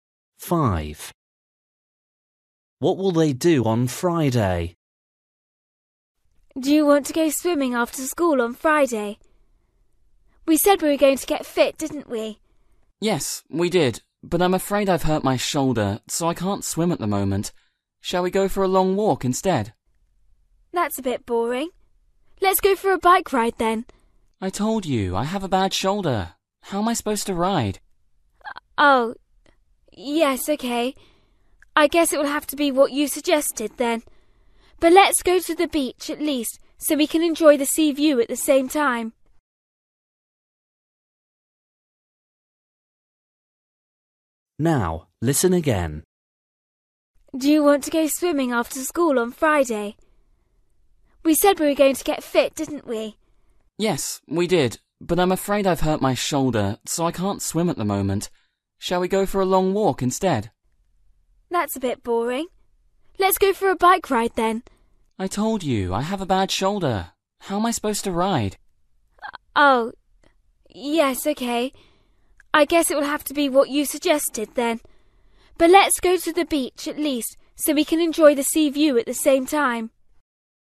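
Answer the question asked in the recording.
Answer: go for a long walk on the beach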